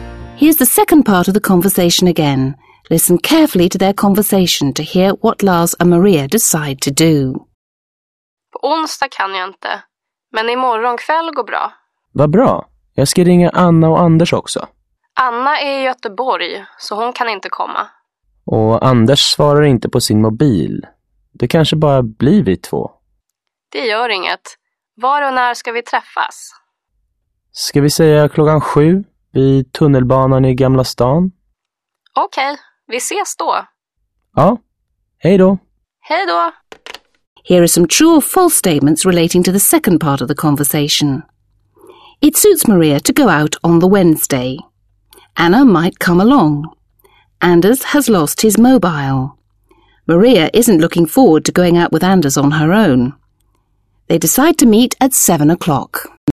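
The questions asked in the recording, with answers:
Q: Anna might come along.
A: False

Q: Anders has lost his mobile.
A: False

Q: Maria isn't looking forward to going out with Anders on her own.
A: False

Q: They decide to meet at 7 o'clock.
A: True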